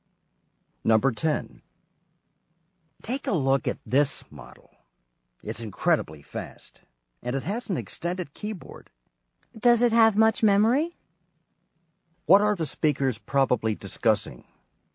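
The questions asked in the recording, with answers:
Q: What are the speakers probably discussing?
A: A computer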